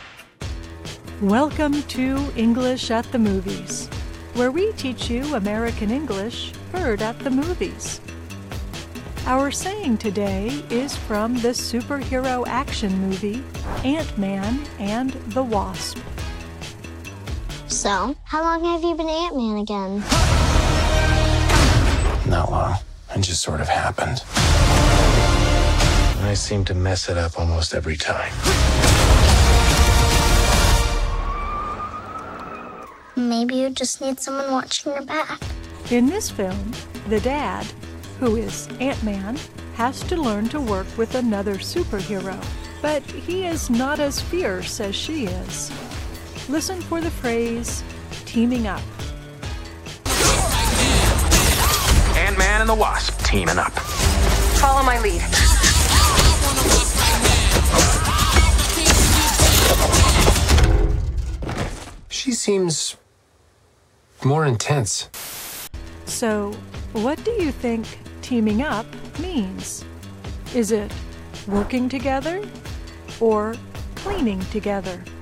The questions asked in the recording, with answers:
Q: So, what do you think teaming up means?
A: Teaming up means working together.